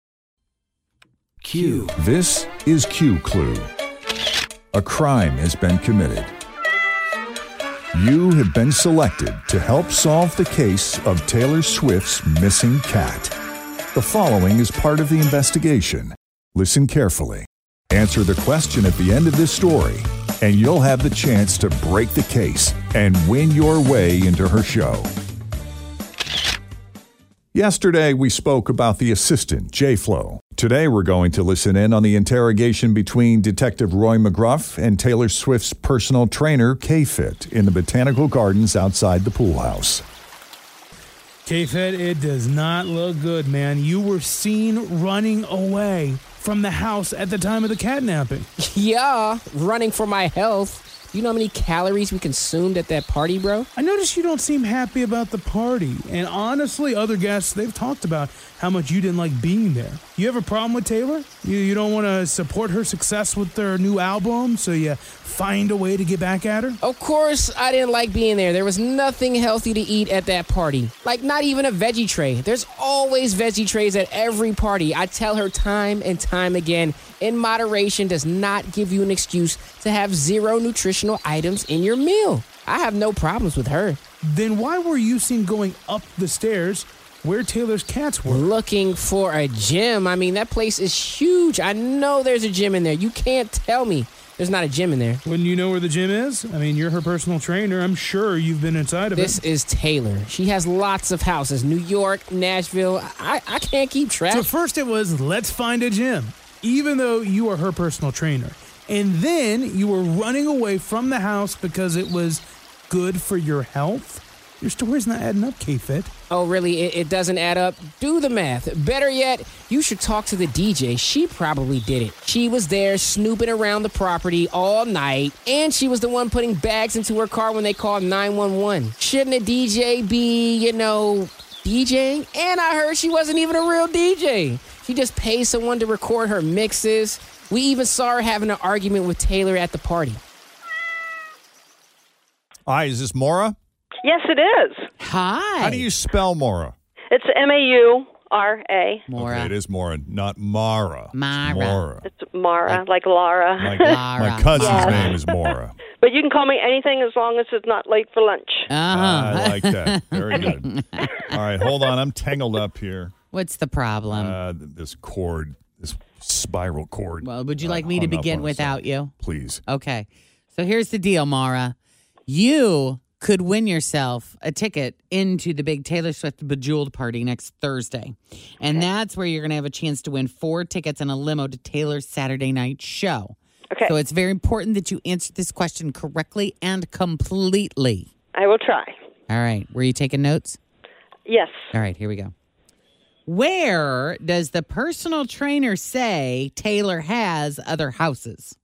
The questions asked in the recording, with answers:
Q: Where does the personal trainer say Taylor has other houses?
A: It was many houses, New York and Nashville.